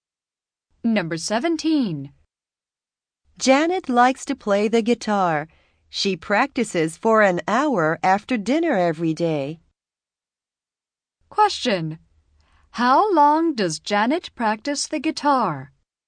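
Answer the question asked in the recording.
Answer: For an hour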